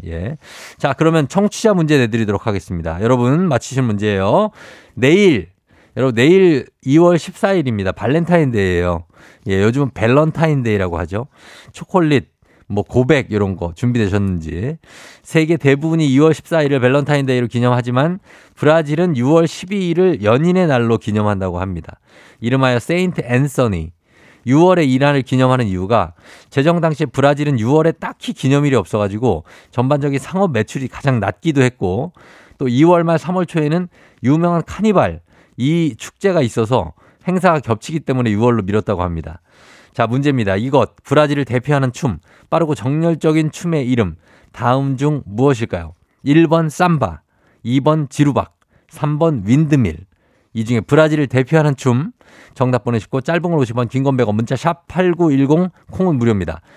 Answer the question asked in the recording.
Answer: 삼바죠 삼바.